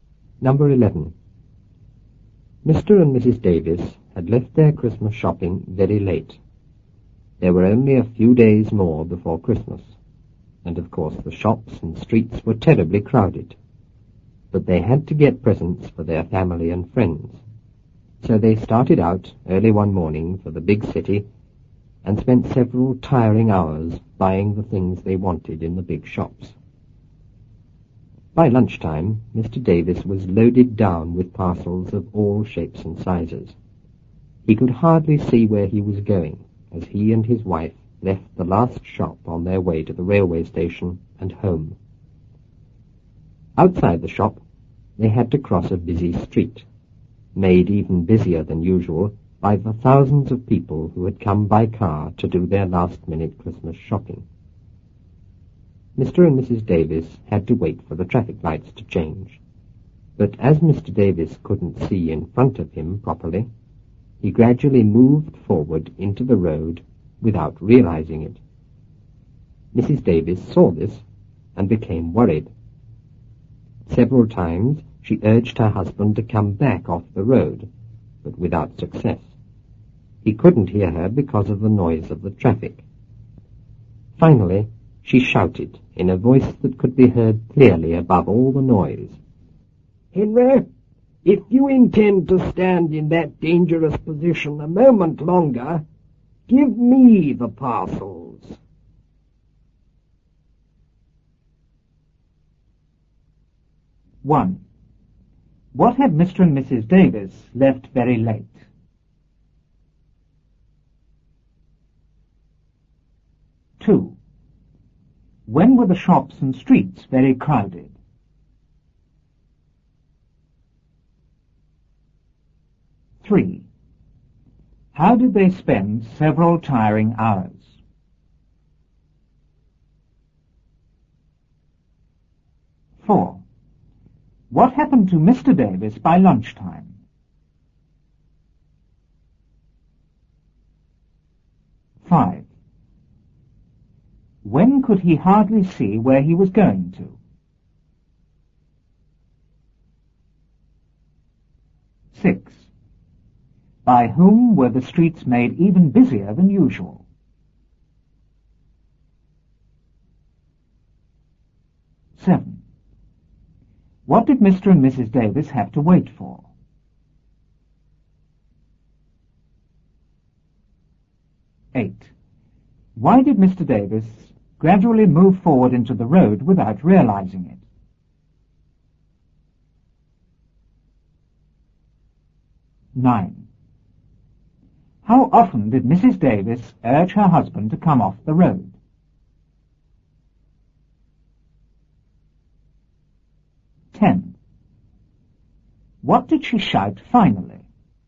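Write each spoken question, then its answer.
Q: What had Mr. and Mrs. Davis left very late?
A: Their Christmas shopping

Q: When were the shops and streets very crowded?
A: A few days before Christmas

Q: How did they spend several tiring hours?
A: Buying the things they wanted in the big shops

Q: What happened to Mr. Davis by lunchtime?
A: He was loaded down with parcels of all shapes and sizes

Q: When could he hardly see where he was going to?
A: As he and his wife left the last shop on their way to the station

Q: By whom were the streets made even busier than usual?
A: By thousands of people who had come by car to do last-minute Christmas shopping

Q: What did Mr. and Mrs. Davis have to wait for?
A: The traffic lights to change

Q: Why did Mr. Davis gradually move forward into the road without realizing it?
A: Because he couldn't see in front of him properly

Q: How often did Mrs. 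Davis urge her husband to come off the road?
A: Several times

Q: What did she shout finally?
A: "Henry, if you intend to stand in that dangerous position a moment longer, give me the parcels."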